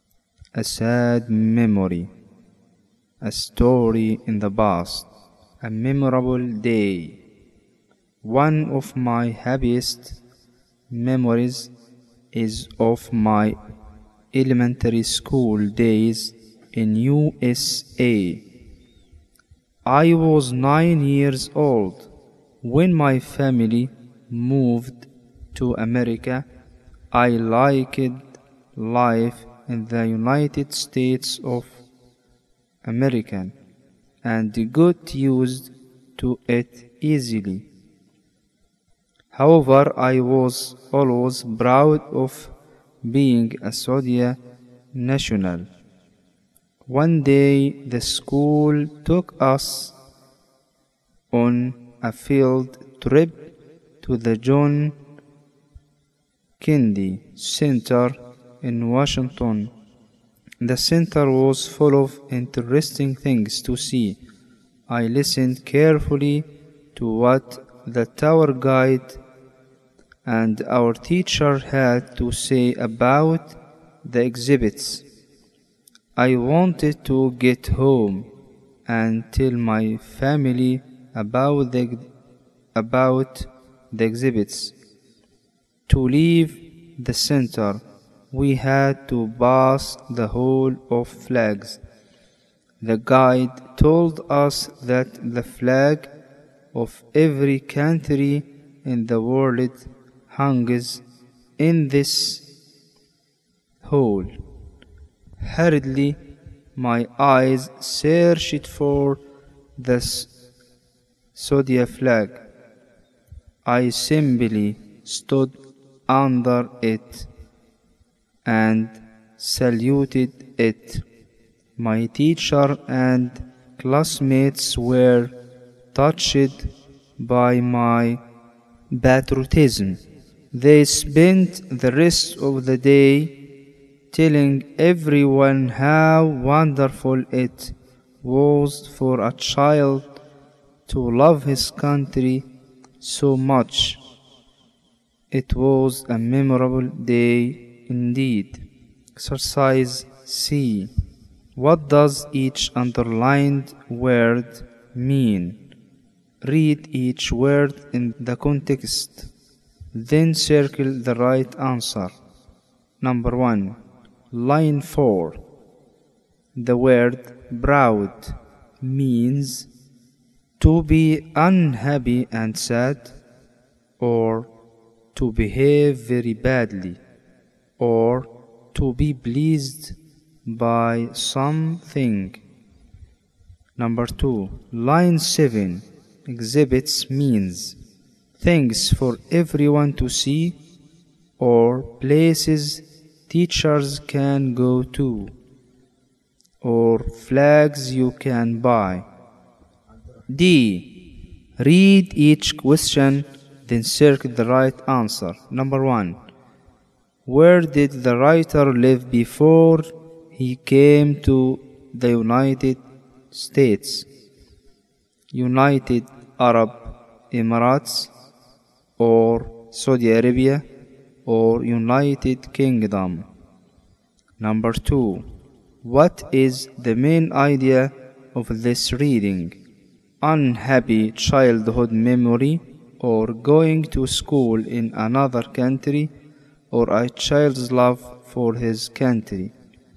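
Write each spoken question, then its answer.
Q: Number 1. Line 4. The word proud means to be unhappy and sad, or to behave very badly, or to be pleased by something.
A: to be pleased by something

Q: Number 2. Line 7. Exhibits means things for everyone to see, or places teachers can go to, or flags you can buy.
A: things for everyone to see

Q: Number 1. Where did the writer live before he came to the United States, United Arab Emirates, or Saudi Arabia, or United Kingdom.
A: Saudi Arabia

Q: Number 2. What is the main idea of this reading?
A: a child's love for his country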